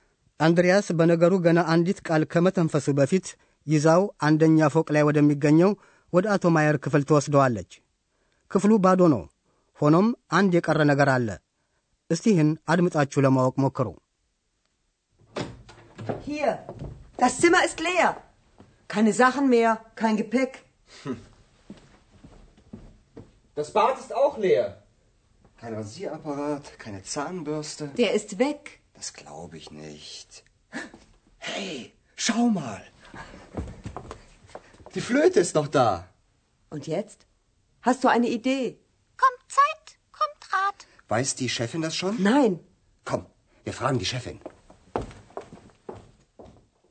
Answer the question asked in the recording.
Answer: በባዶ ክፍል ውስጥ የቀረችው የአቶ ማየር ዋሽንት ብቻ ናት።